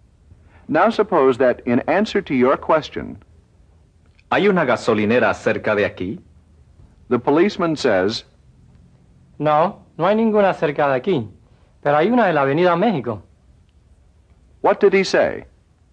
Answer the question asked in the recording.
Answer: He said, No, there isn't any near here, but there is one on Mexico Avenue.